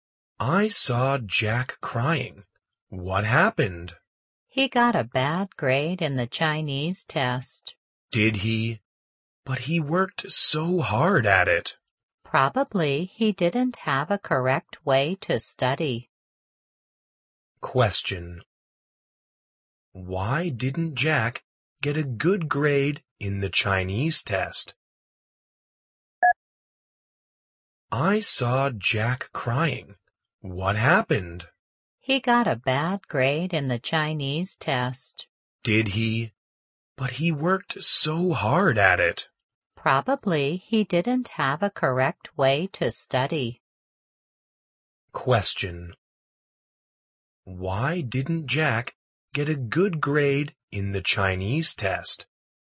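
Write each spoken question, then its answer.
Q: Why didn't Jack get a good grade in the Chinese test?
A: He probably didn't study the right way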